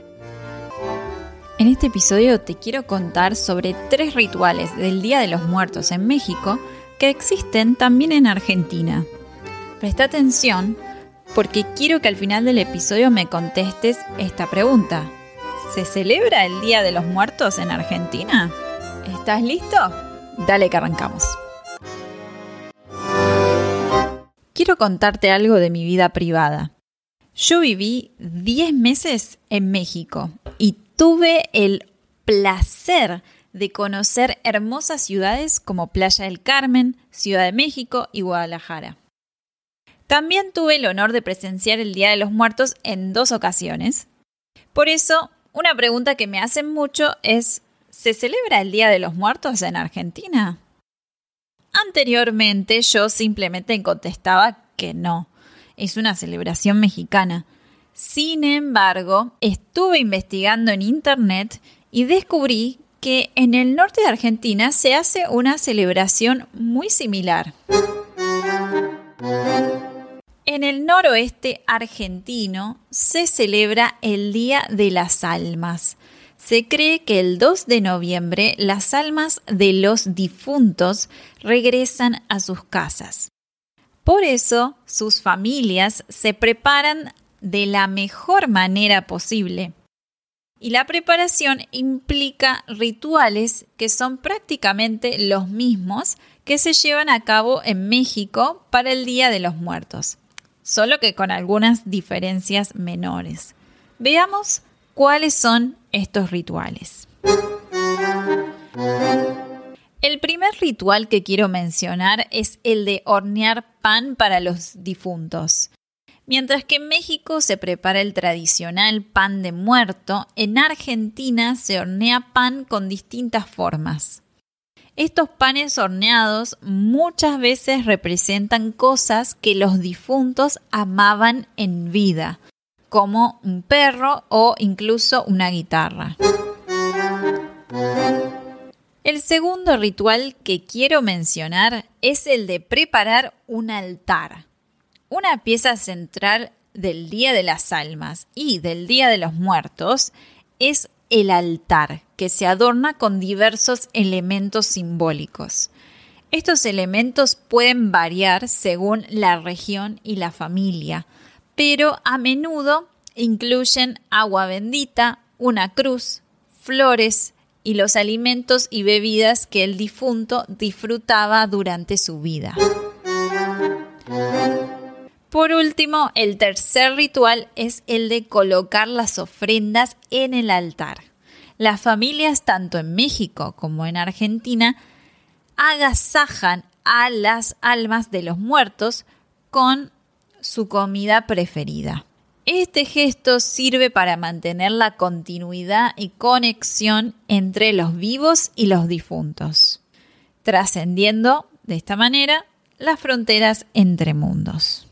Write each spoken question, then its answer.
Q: ¿Se celebra el Día de los Muertos en Argentina?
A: ya sabéis que el Día de los Muertos no se celebra en Argentina.